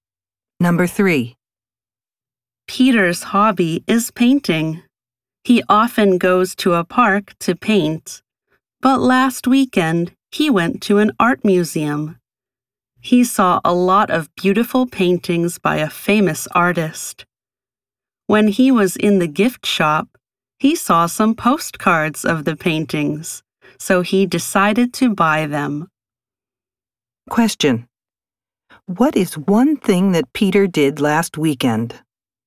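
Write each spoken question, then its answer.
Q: What is one thing that Peter did last weekend?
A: He went to an art museum and bought postcards.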